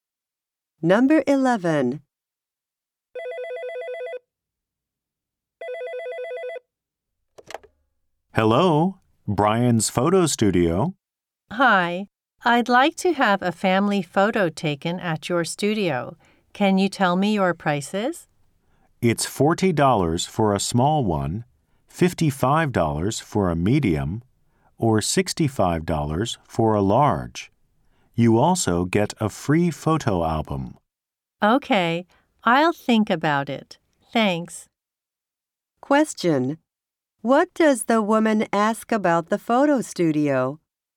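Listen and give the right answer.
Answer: Its prices for family photos.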